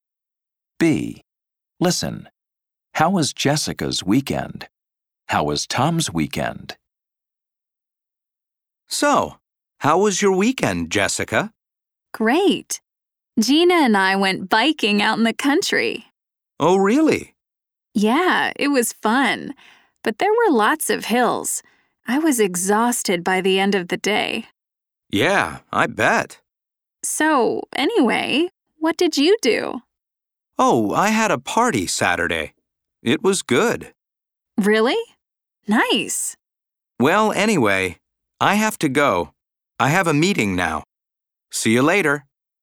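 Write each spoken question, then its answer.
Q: How was Jessica's weekend?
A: Great, fun but tiring; she went biking in the country with Gina and was exhausted.

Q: How was Tom's weekend?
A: Good; he had a party on Saturday.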